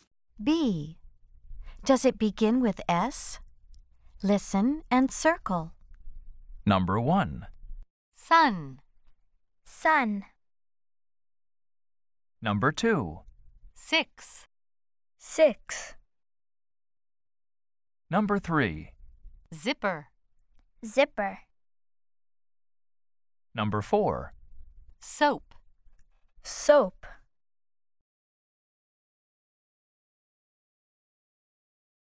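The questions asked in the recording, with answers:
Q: Does it begin with S?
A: Yes (sun)

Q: Does it begin with S?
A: Yes (six)

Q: Does it begin with S?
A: No (zipper)

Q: Does it begin with S?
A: Yes (soap)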